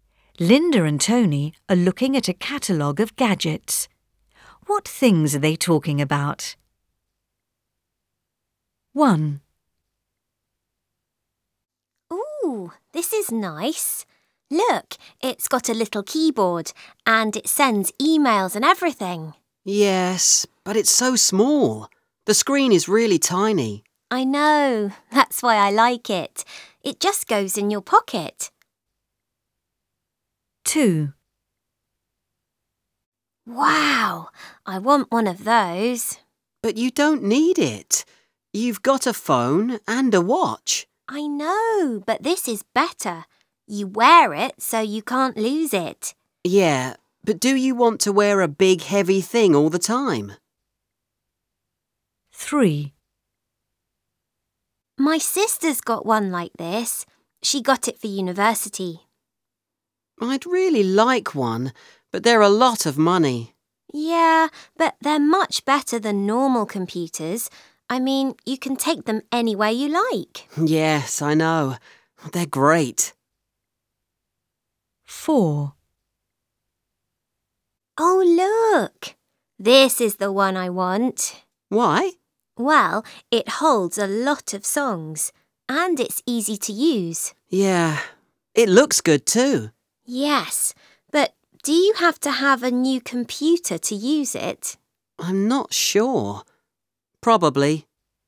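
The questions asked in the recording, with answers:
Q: What things are they talking about?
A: a laptop computer

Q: What things are they talking about?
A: an MP3 player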